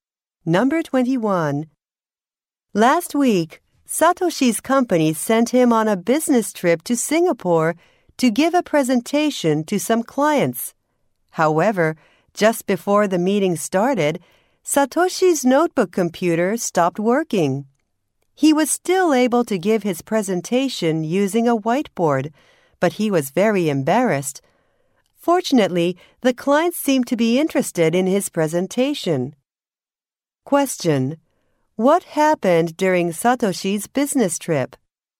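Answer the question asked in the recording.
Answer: His notebook computer stopped working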